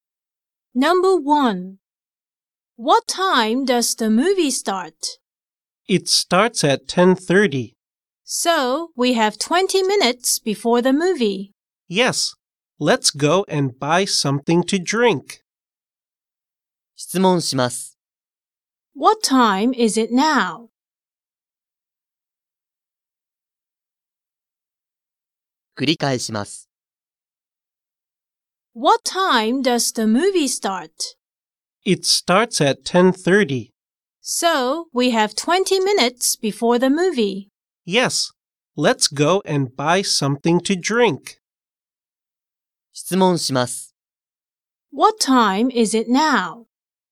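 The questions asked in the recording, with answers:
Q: What time is it now?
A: 10:10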